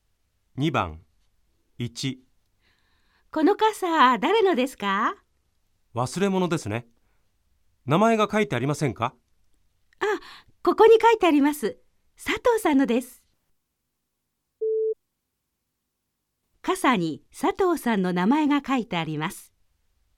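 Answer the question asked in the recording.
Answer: 〇(正しい)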